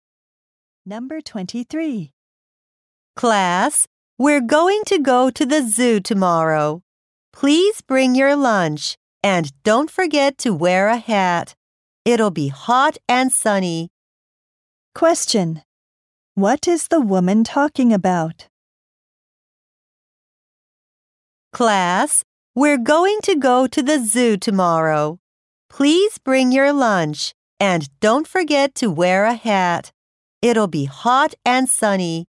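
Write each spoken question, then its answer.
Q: Question. What is the woman talking about?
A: The class trip to the zoo tomorrow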